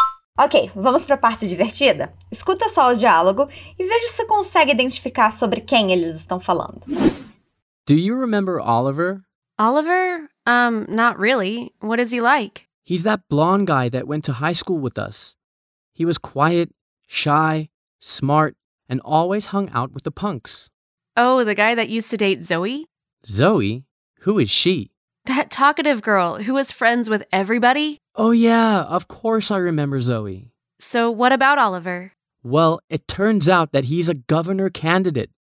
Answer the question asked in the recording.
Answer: Eles estão falando do Oliver e vagamente da Zoe.